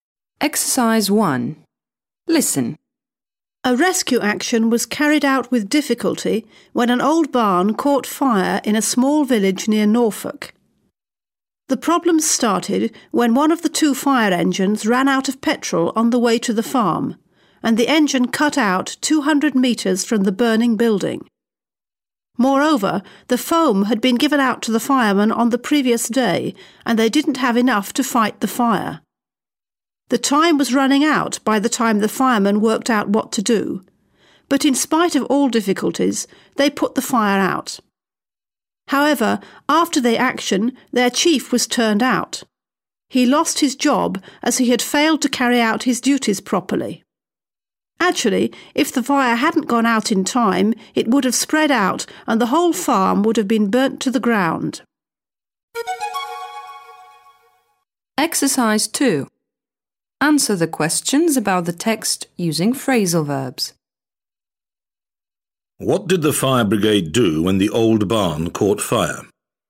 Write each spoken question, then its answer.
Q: What did the fire brigade do when the old barn caught fire?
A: They carried out a rescue action.